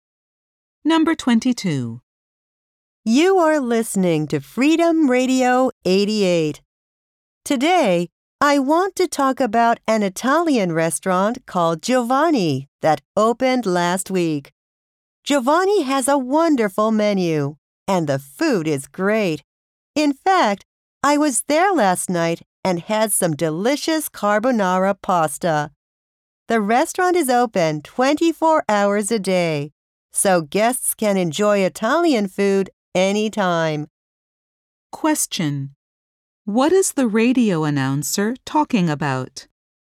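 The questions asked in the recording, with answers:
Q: What is the radio announcer talking about?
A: A new Italian restaurant called Giovanni.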